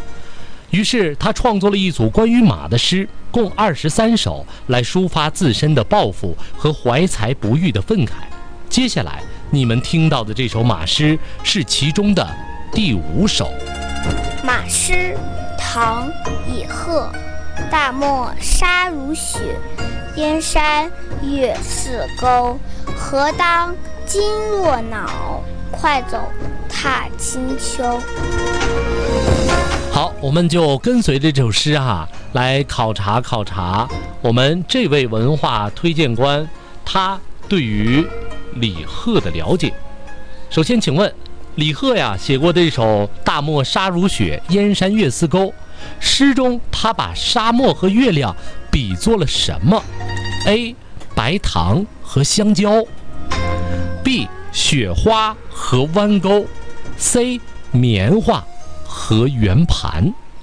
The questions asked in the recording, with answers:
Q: 首先请问李贺呀,写过这首大漠沙如雪,燕山月似钩,诗中他把沙漠和月亮比作了什么?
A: 他把大漠呢这个沙子呀比作了洁白的雪花,把弯弯的月亮呢比作了银钩